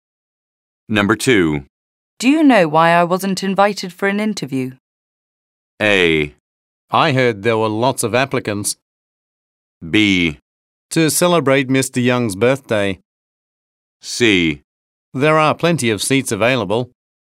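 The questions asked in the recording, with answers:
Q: Do you know why I wasn't invited for an interview?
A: A: I heard there were lots of applicants.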